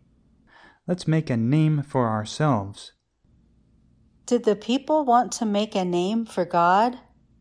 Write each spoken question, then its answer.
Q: Did the people want to make a name for God?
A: No, the people wanted to make a name for themselves.